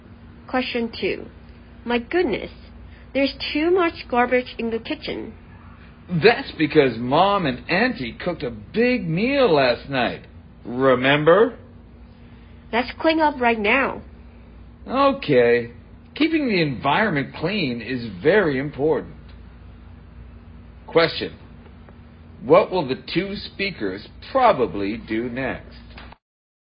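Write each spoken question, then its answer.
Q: What will the two speakers probably do next?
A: Clean up the garbage in the kitchen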